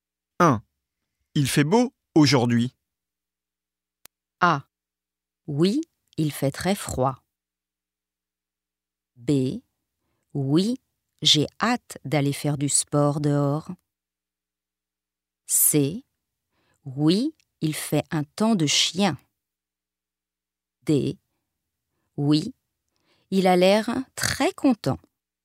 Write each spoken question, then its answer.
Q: Il fait beau aujourd'hui.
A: B. Oui, j'ai hâte d'aller faire du sport dehors.